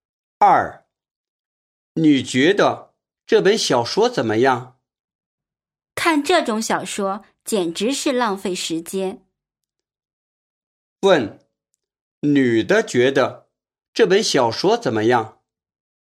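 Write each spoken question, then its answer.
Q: 问,女的觉得这本小说怎么样?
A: 不好,看它是浪费时间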